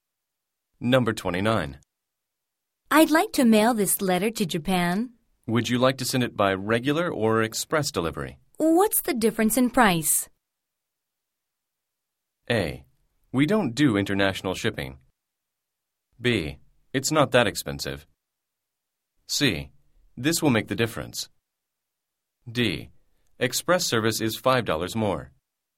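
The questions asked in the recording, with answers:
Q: What's the difference in price?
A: D: Express service is $5 more.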